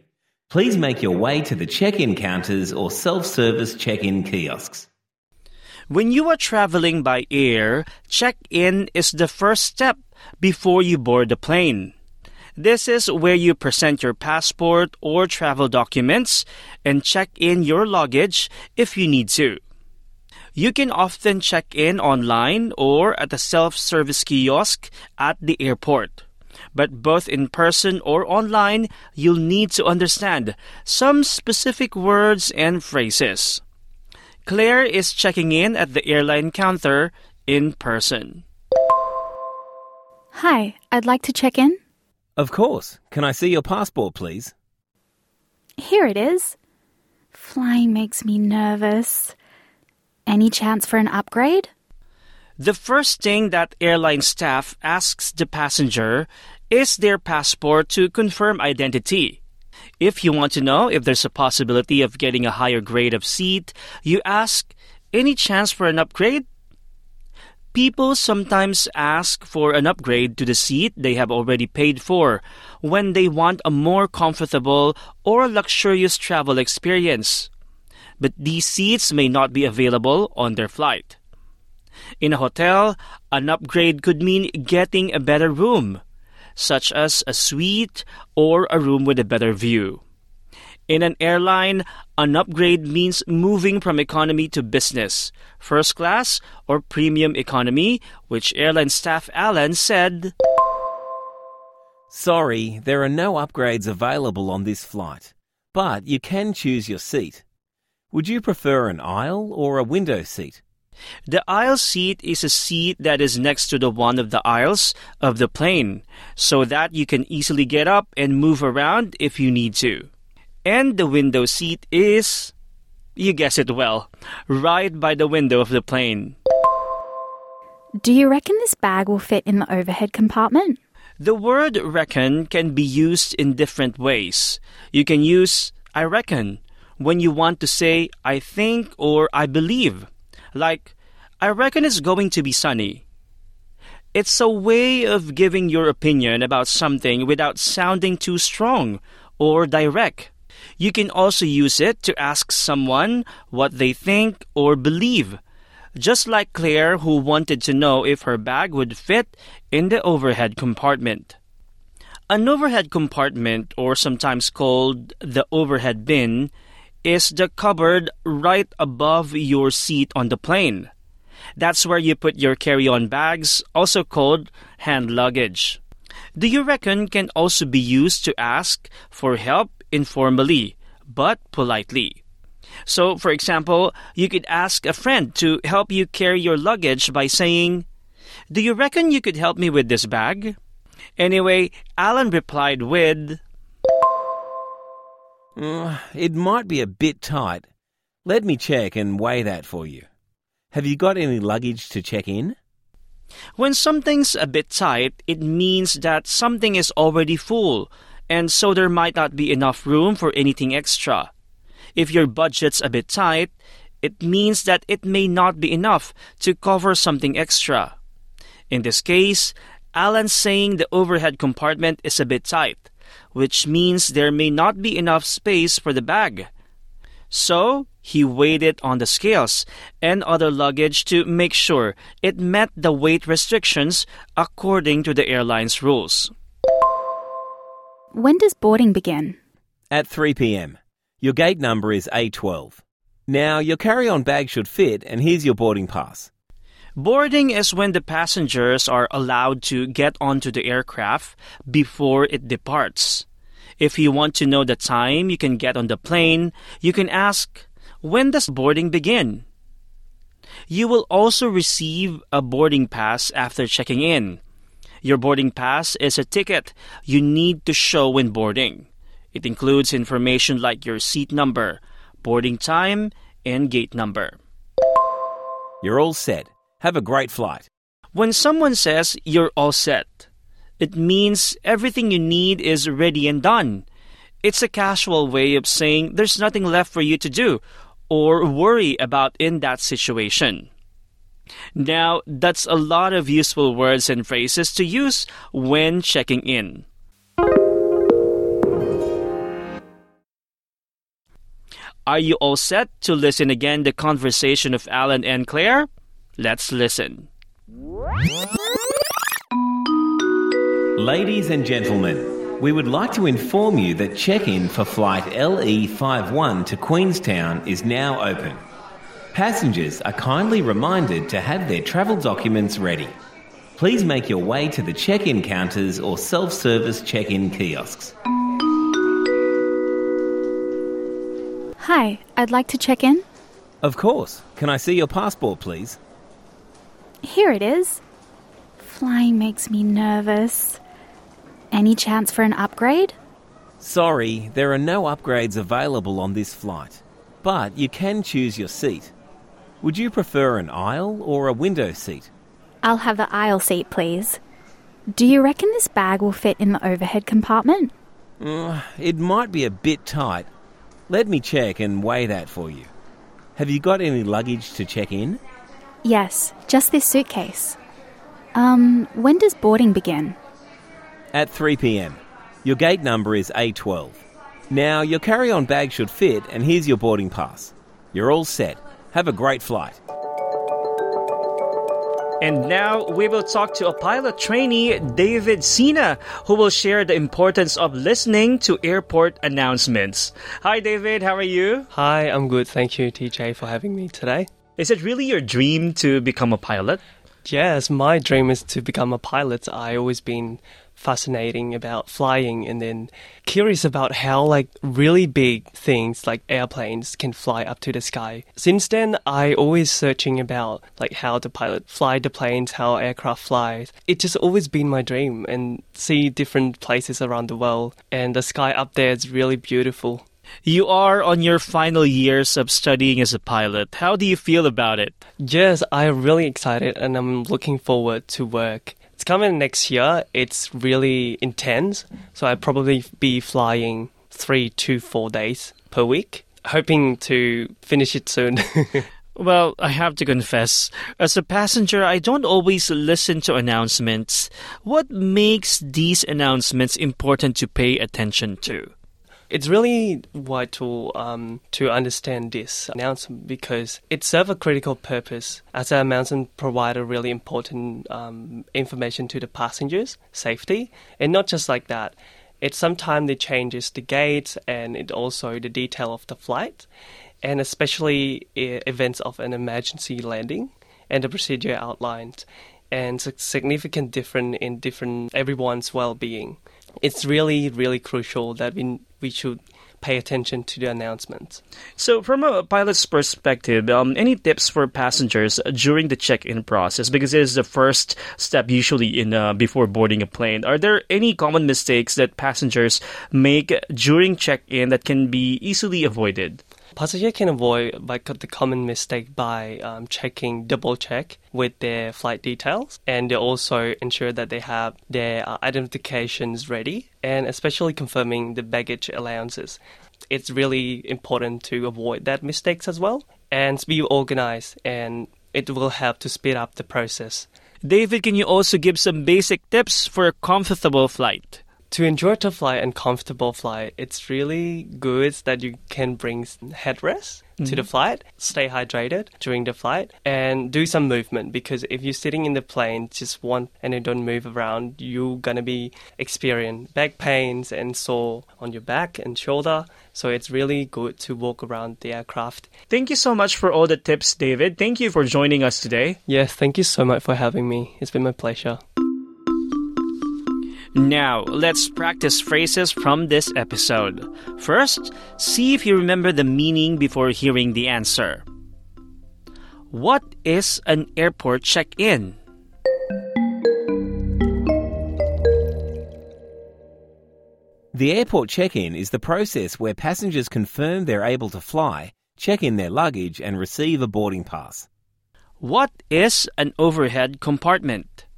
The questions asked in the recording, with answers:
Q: What is an overhead compartment?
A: An overhead compartment, or overhead bin, is the cupboard above your seat on the plane.